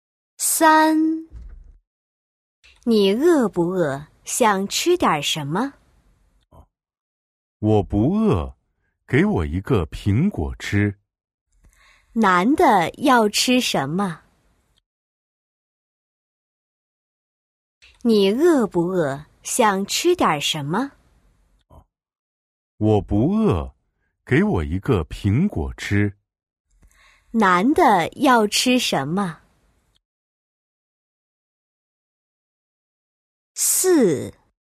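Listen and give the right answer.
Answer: 一个苹果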